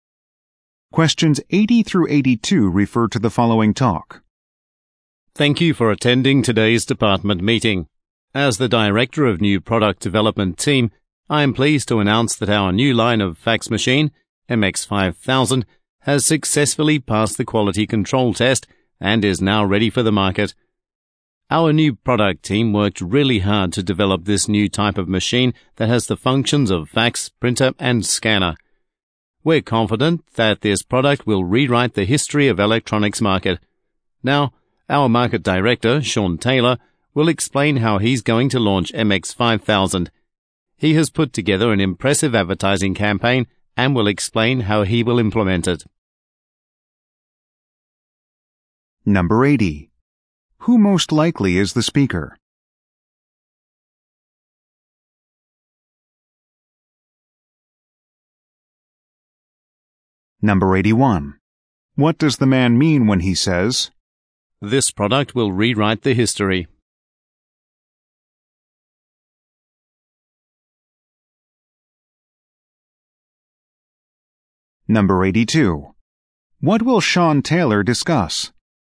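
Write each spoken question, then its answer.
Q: Who most likely is the speaker?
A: The director of the New Product Development Team

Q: What will Sean Taylor discuss?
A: How he will launch MX5000 with an advertising campaign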